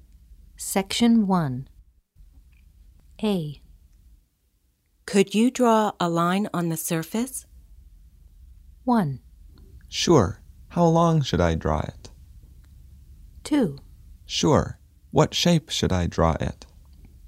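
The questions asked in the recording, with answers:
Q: Could you draw a line on the surface?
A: 1: Sure. How long should I draw it?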